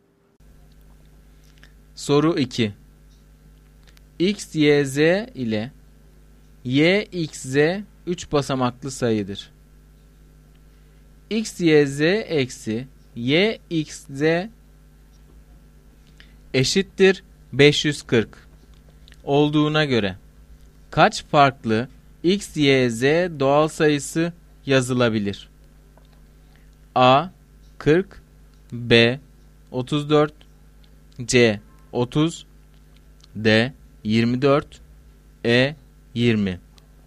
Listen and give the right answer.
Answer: Doğru cevap C şıkkı.